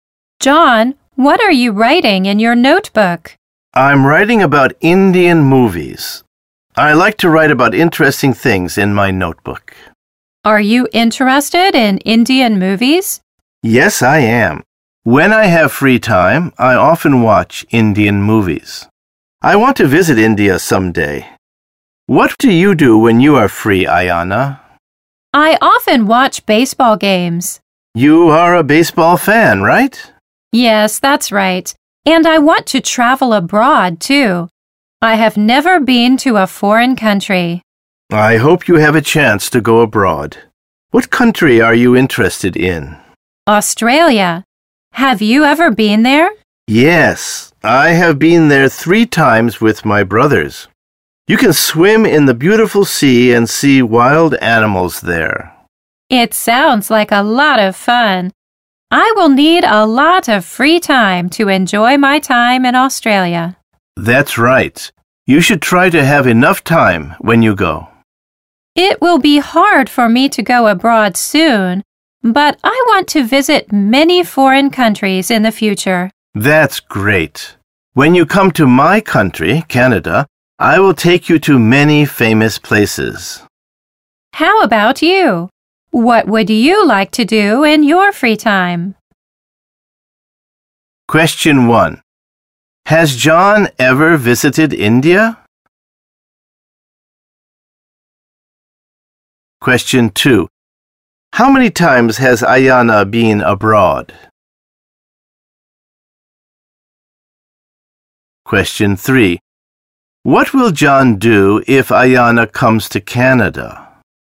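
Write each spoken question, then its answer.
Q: Has John ever visited India?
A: No, he hasn't.

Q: How many times has Ayana been abroad?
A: Never (she has never been abroad).

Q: What will John do if Ayana comes to Canada?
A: He will take her to many famous places.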